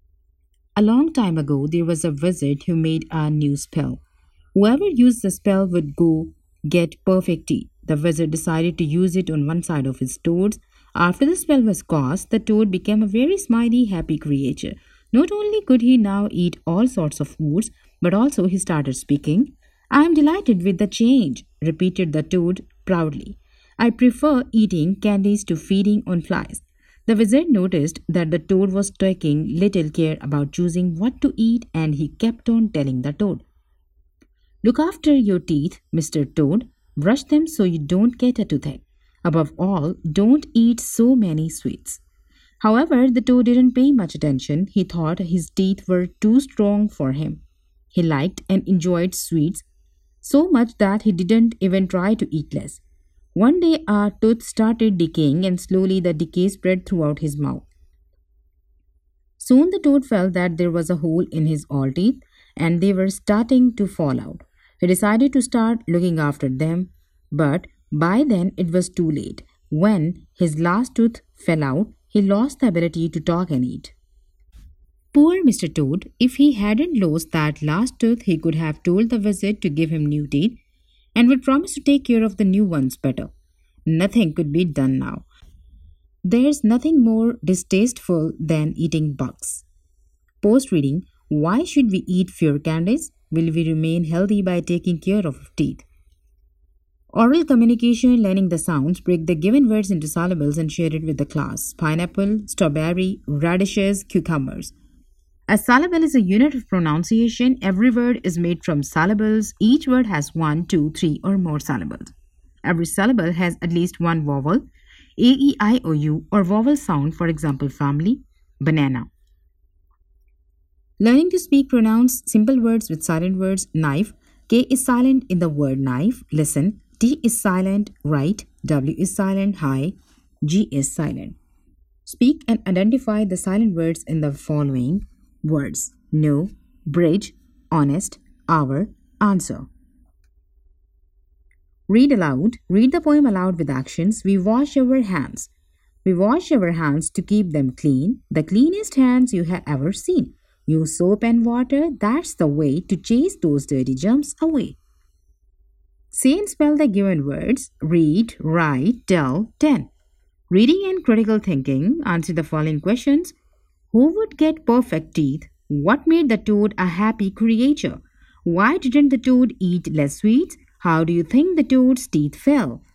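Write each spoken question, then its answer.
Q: Who would get perfect teeth?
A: Whoever used the wizard's spell

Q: What made the toad a happy creature?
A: The wizard's spell gave him perfect teeth

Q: Why didn't the toad eat less sweets?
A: He liked sweets so much and thought his teeth were too strong

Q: How do you think the toad's teeth fell?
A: They decayed because he ate too many sweets and did not look after them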